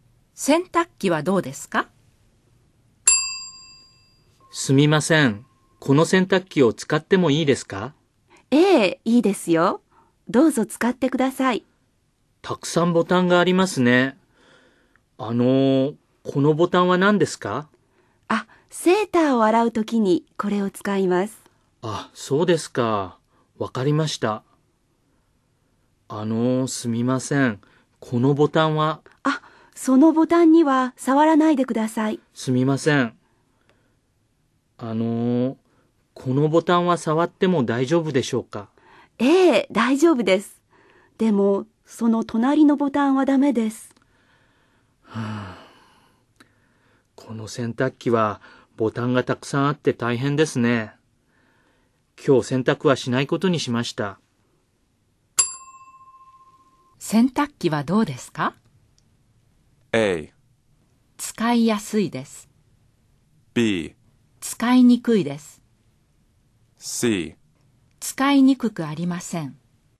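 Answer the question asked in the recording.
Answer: B: 使いにくいです。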